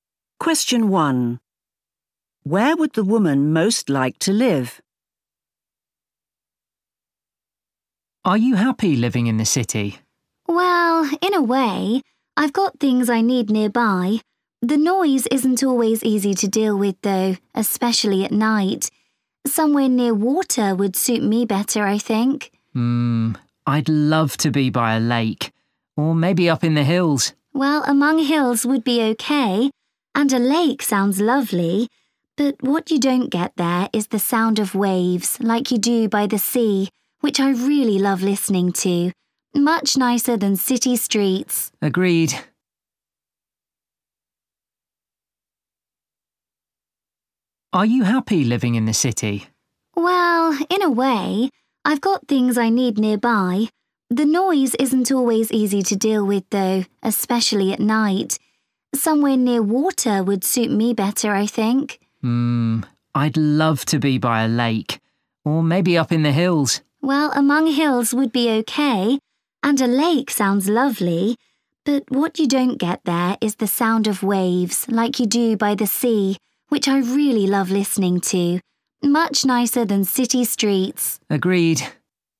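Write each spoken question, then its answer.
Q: Where would the woman most like to live?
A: by the sea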